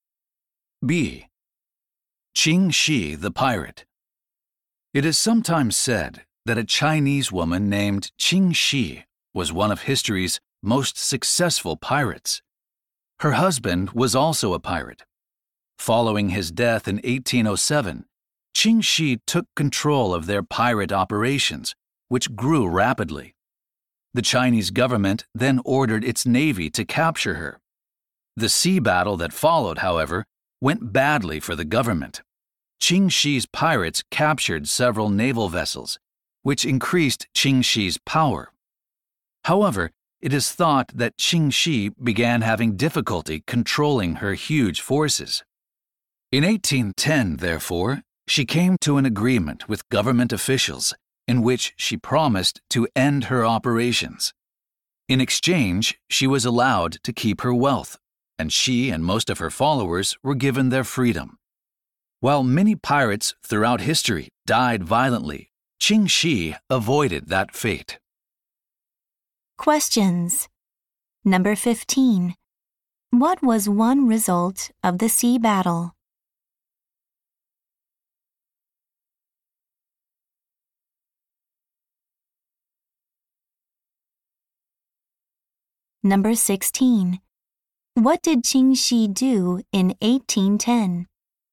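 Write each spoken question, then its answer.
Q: What was one result of the sea battle?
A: Qing Shi's power increased because her pirates captured naval vessels.

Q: What did Qing Shi do in 1810?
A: She agreed with the government to end her pirate operations.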